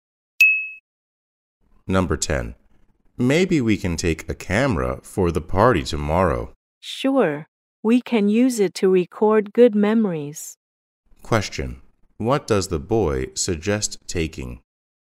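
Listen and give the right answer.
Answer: A camera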